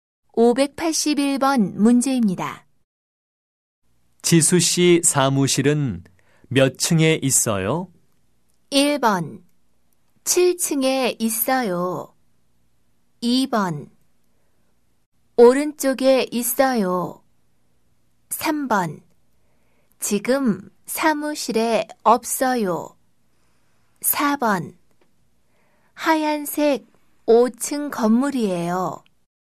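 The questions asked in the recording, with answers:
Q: 지수 씨 사무실은 몇 층에 있어요?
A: 1: 7층에 있어요.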